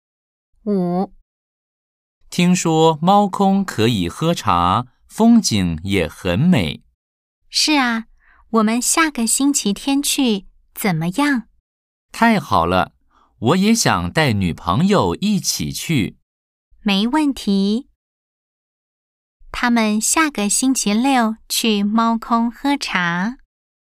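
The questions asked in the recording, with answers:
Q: 他们下个星期六去猫空喝茶。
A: X (false)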